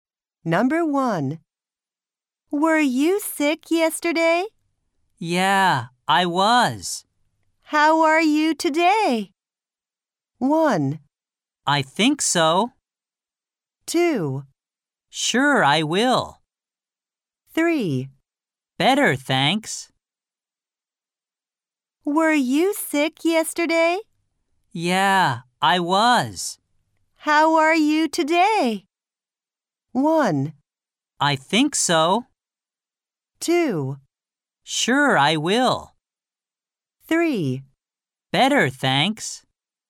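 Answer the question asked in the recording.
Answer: 3: Better, thanks.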